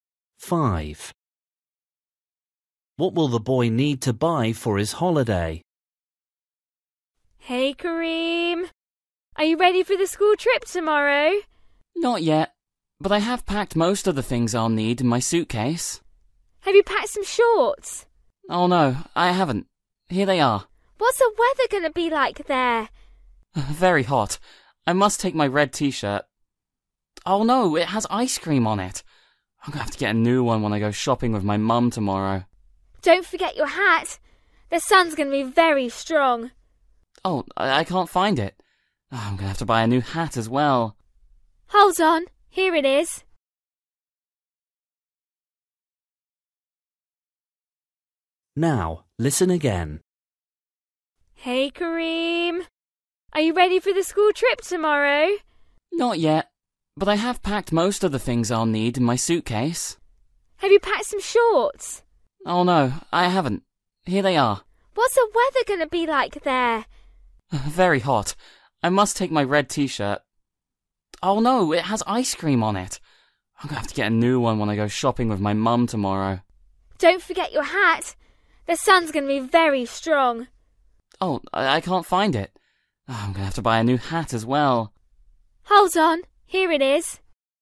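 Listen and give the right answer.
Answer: A new (red) T-shirt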